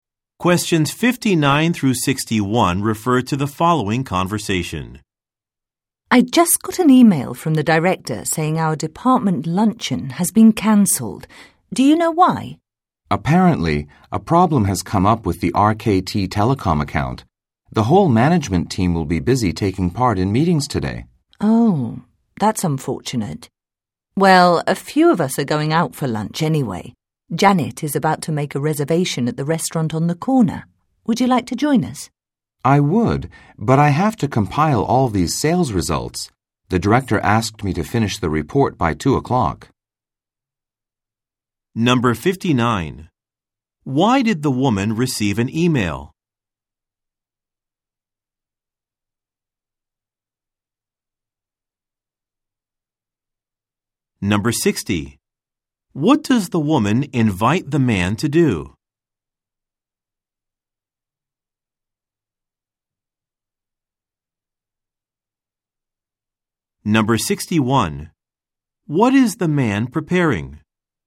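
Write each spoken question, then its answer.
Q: What does the woman invite the man to do?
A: Join coworkers for lunch at a restaurant

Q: What is the man preparing?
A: A sales report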